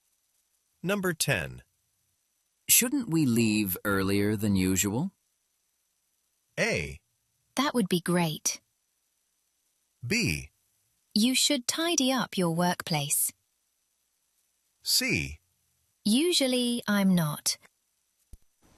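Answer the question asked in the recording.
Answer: A: That would be great.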